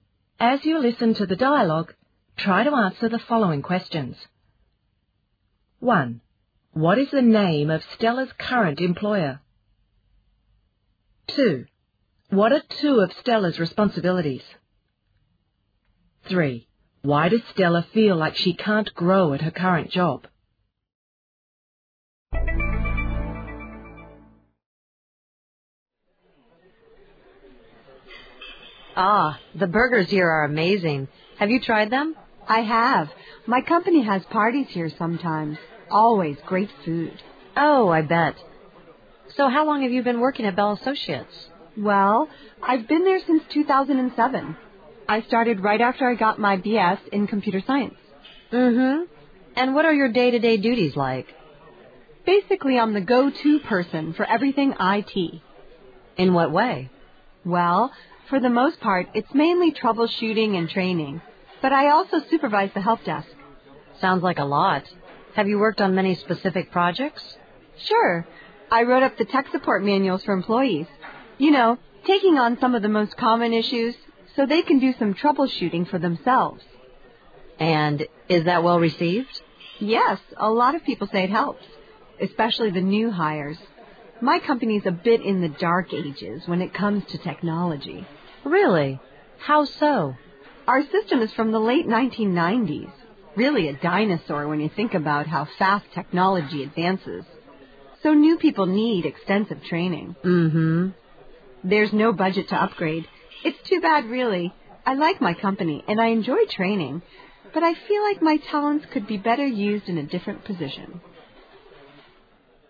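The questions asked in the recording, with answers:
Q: What is the name of Stella's current employer?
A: Bell Associates

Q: What are two of Stella's responsibilities?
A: Troubleshooting and training (she also supervises the help desk)

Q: Why does Stella feel like she can't grow at her current job?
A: The company's IT system is outdated (from the late 1990s) and there's no budget to upgrade, so her talents aren't well used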